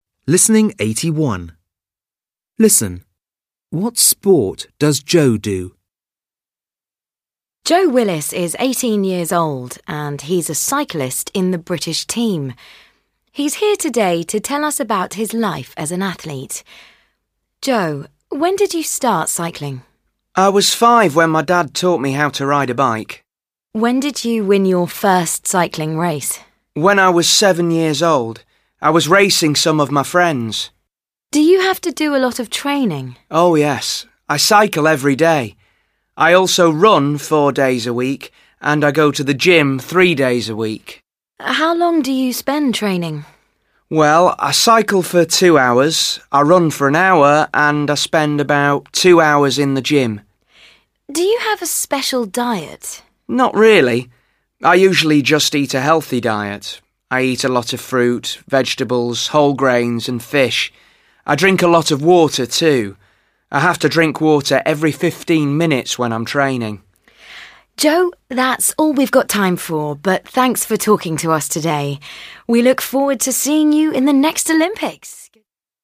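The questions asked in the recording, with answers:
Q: What sport does Joe do?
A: Cycling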